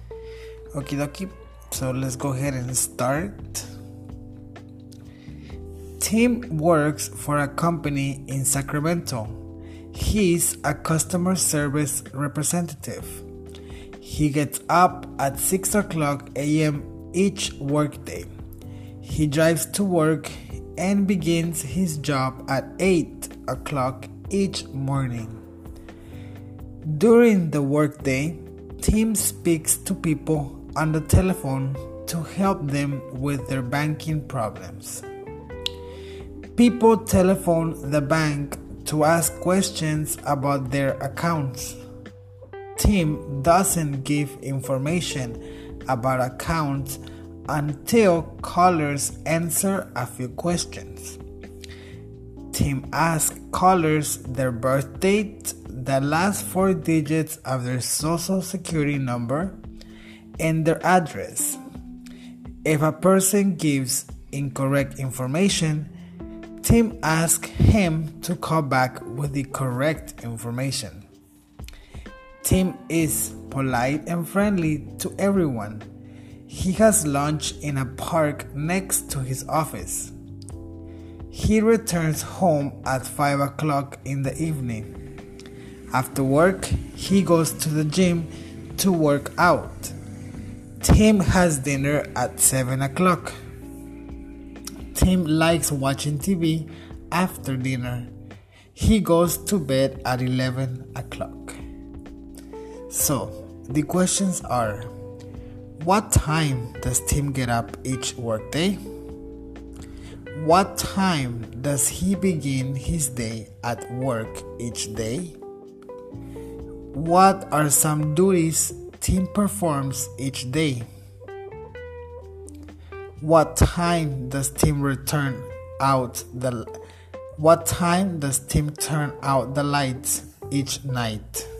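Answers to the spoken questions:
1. At 6 o'clock a.m.
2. At 8 o'clock
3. He speaks to people on the telephone to help them with their banking problems and asks callers questions to check who they are
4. At 11 o'clock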